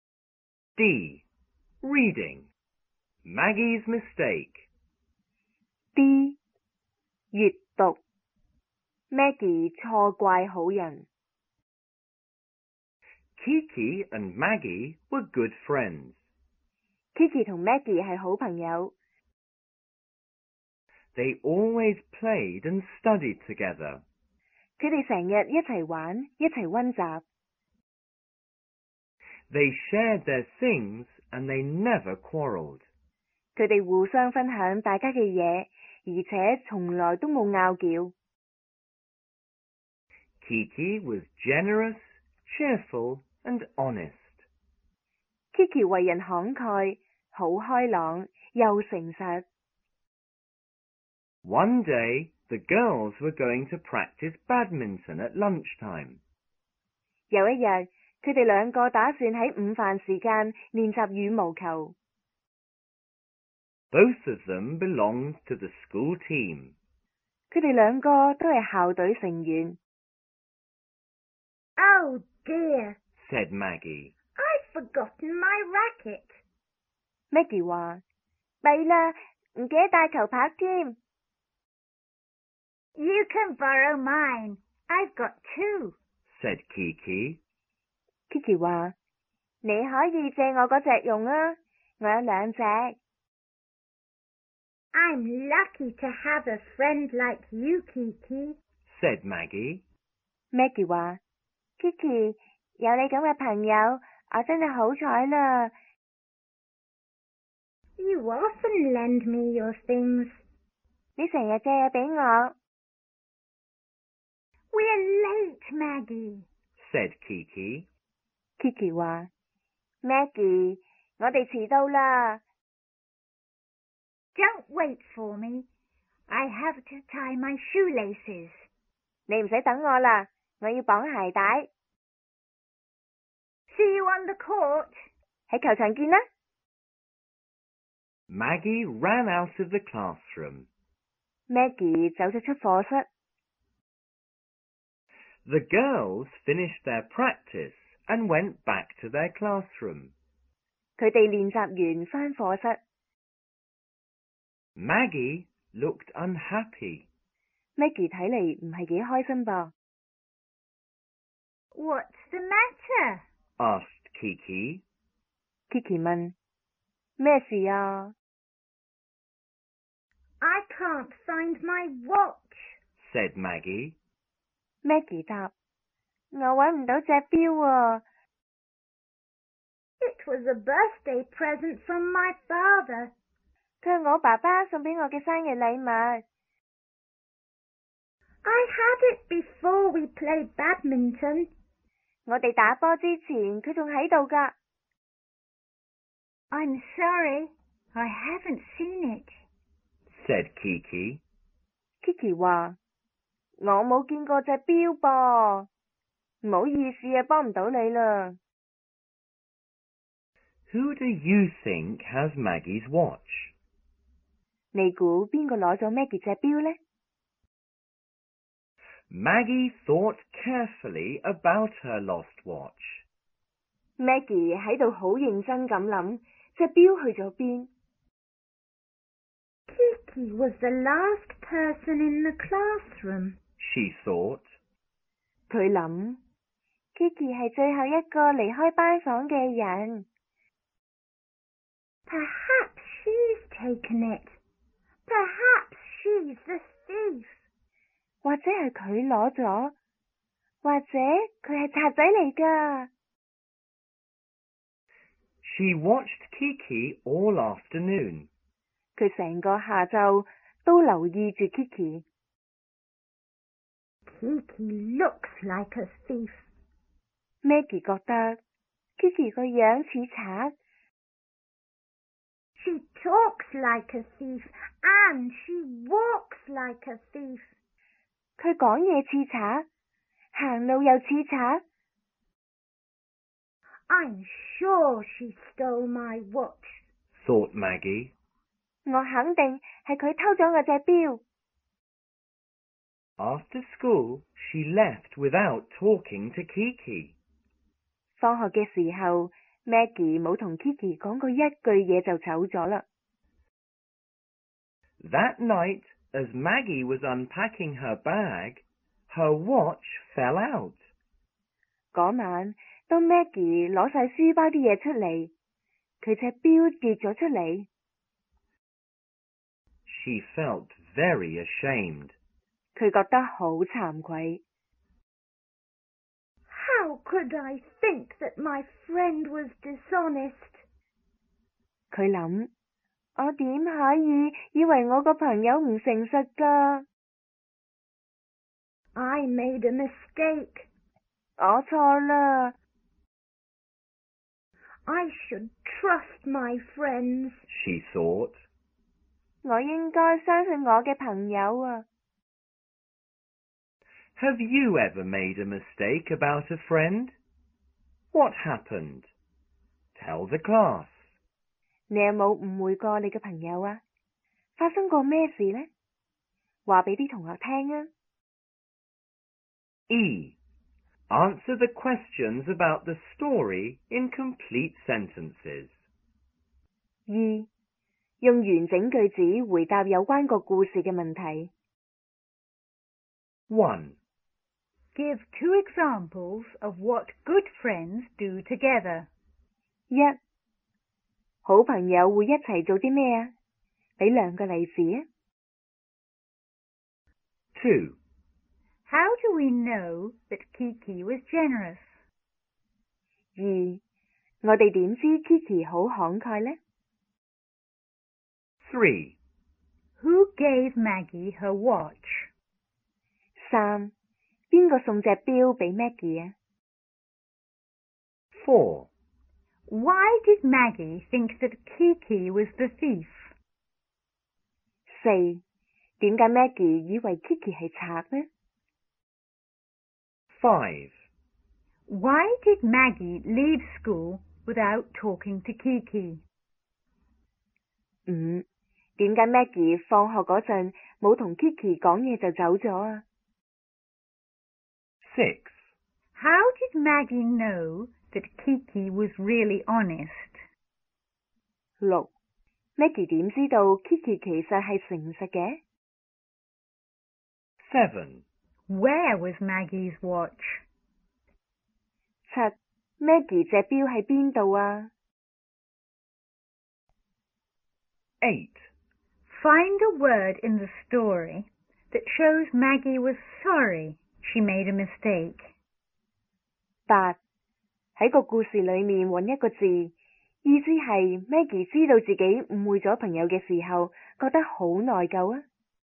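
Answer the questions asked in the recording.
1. They played and studied together (and shared their things).
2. She lent Maggie her racket; she often lent Maggie her things.
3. Her father gave it to her as a birthday present.
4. Kiki was the last person in the classroom.
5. She was sure Kiki had stolen her watch.
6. Her watch fell out of her bag when she unpacked it that night.
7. In her bag.
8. ashamed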